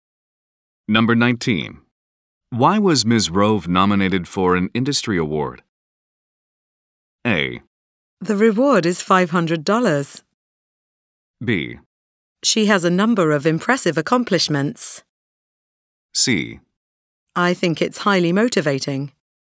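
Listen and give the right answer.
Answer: B: She has a number of impressive accomplishments.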